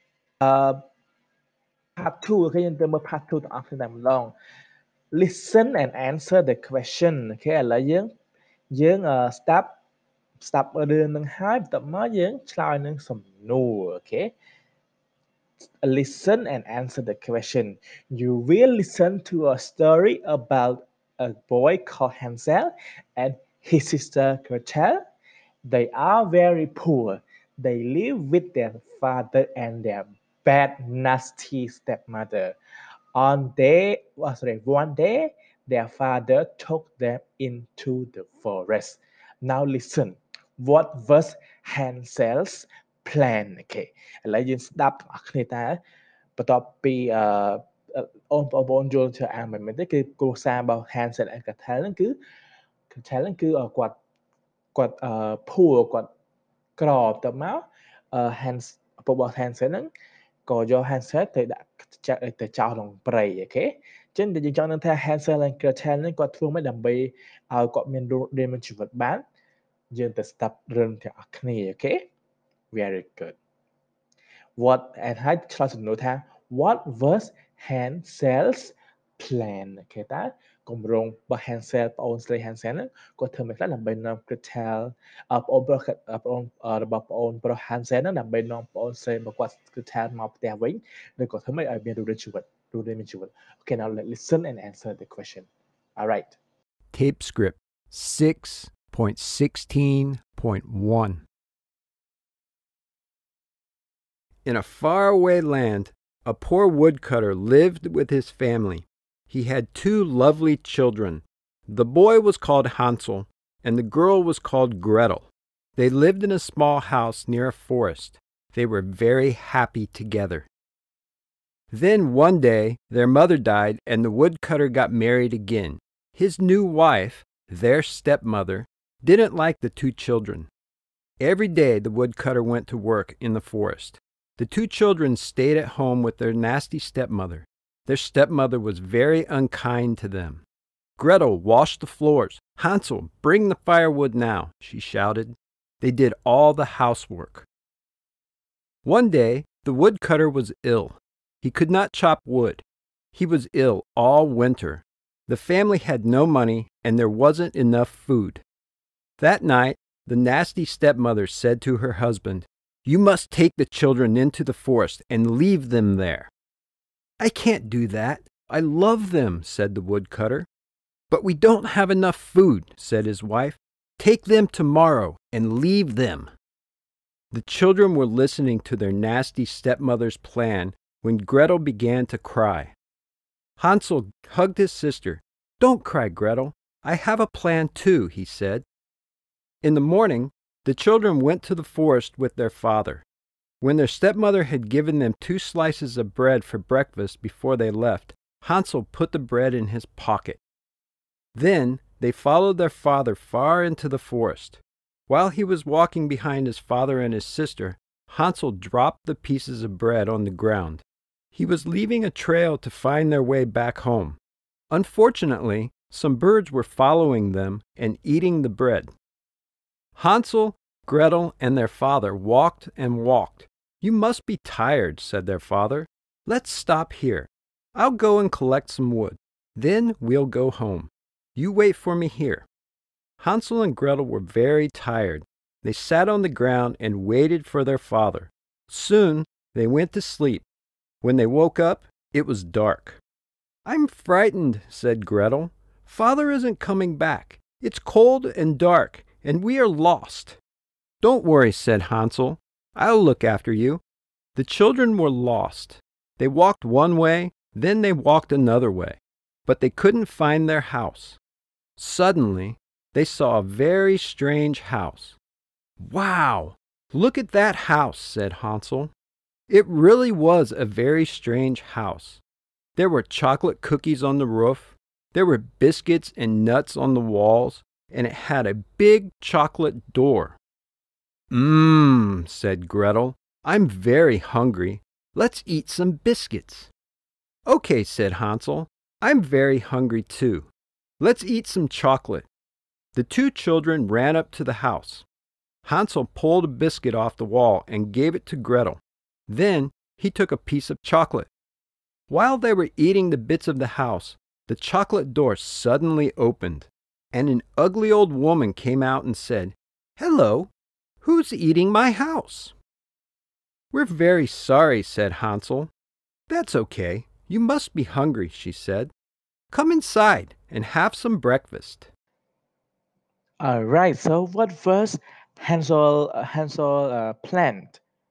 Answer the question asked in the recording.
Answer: He made a trail with the pieces of bread to find their way back home, right?